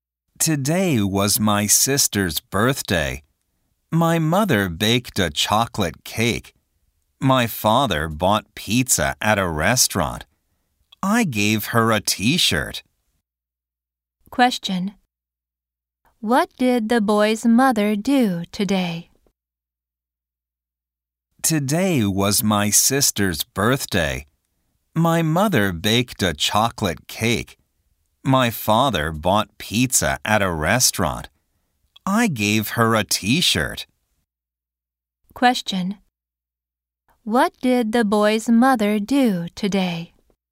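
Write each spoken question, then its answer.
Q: What did the boy's mother do today?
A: She baked a chocolate cake.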